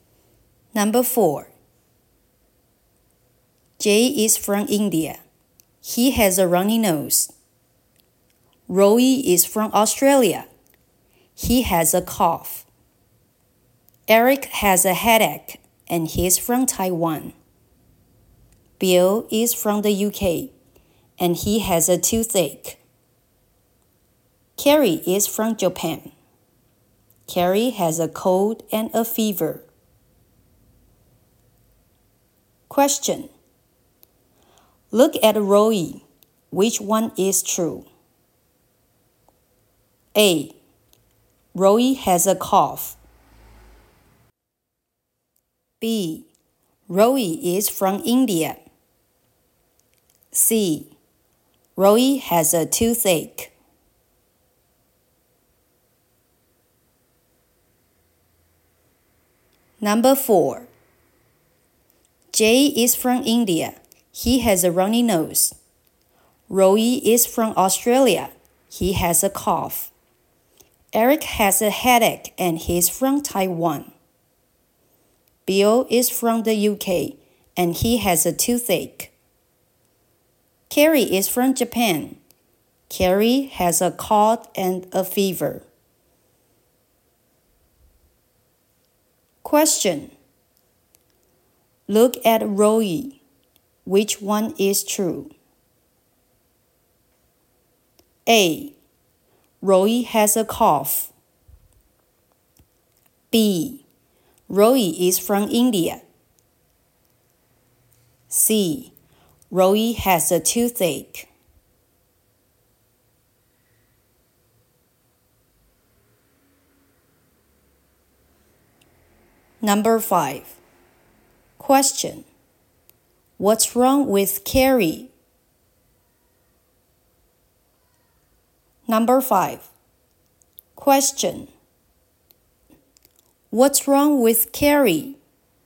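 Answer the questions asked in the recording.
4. A: Roy has a cough.
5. She has a cold and a fever.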